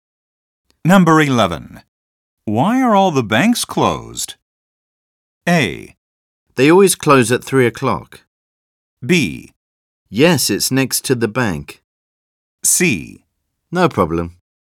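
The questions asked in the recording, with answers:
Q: Why are all the banks closed?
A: A: They always close at 3 o'clock.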